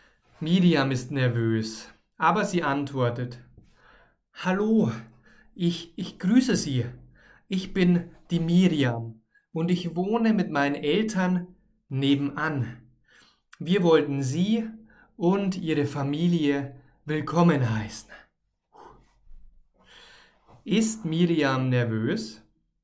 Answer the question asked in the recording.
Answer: Ja, sie ist nervös.